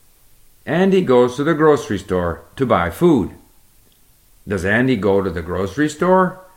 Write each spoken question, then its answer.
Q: Does Andy go to the grocery store?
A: Yes, Andy goes to the grocery store to buy food.